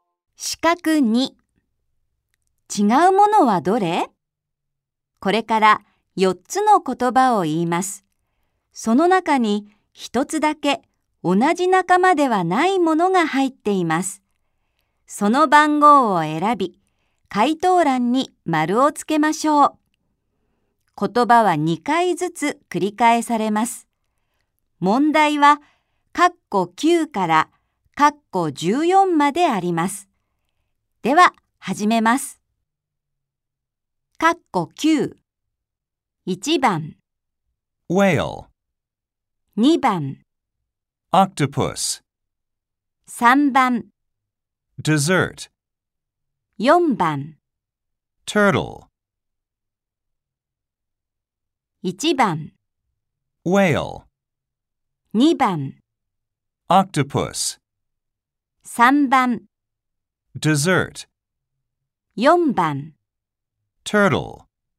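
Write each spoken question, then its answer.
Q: 違うものはどれ?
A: 3: Dessert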